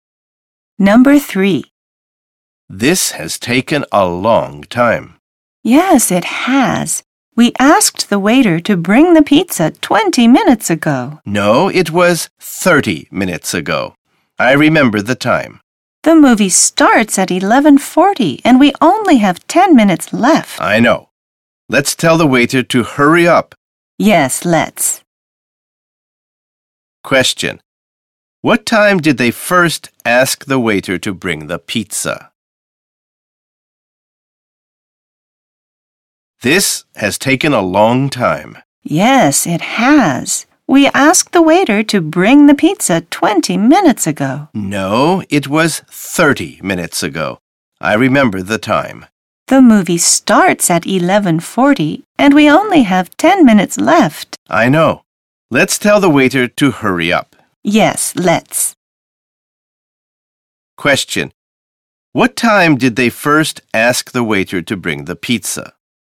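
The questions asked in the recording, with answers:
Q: What time did they first ask the waiter to bring the pizza?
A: At 11:00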